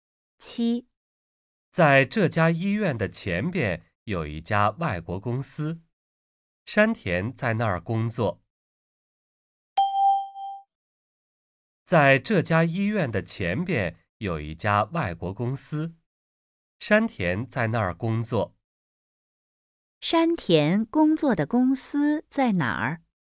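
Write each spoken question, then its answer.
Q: 山田工作的公司在哪儿?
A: 在这家医院的前边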